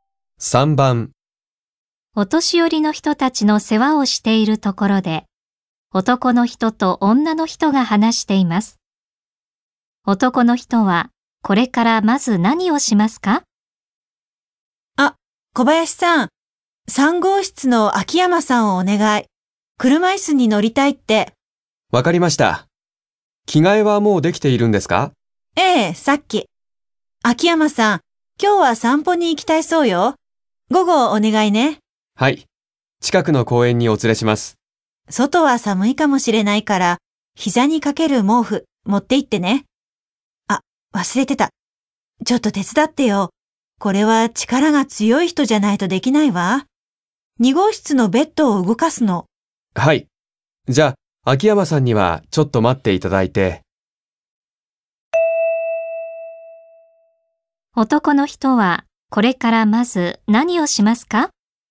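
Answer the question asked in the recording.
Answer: 2号室のベッドを動かすのを手伝う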